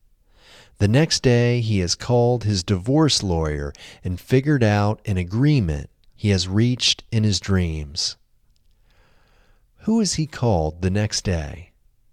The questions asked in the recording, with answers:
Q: Who has he called the next day?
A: He has called his divorce lawyer the next day.